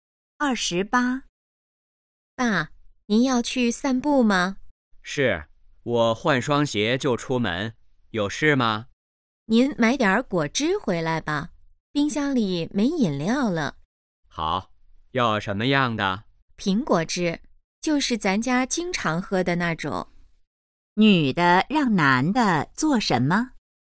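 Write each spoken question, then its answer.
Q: 女的让男的做什么?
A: 买苹果汁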